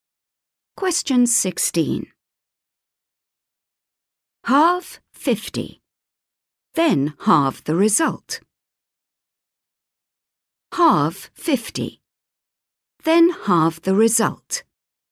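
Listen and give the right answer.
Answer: 12.5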